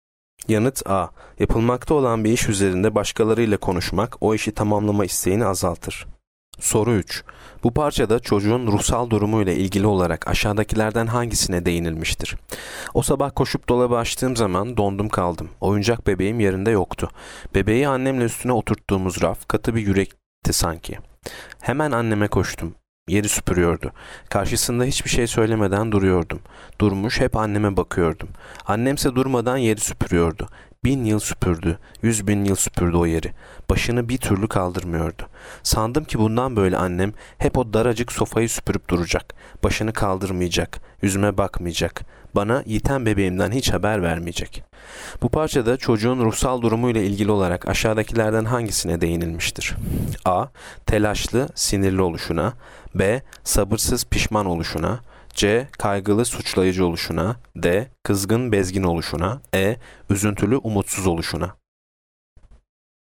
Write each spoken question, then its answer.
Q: Bu parçada çocuğun ruhsal durumuyla ilgili olarak aşağıdakilerden hangisine değinilmiştir?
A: Yanıt E. Üzüntülü, umutsuz oluşuna.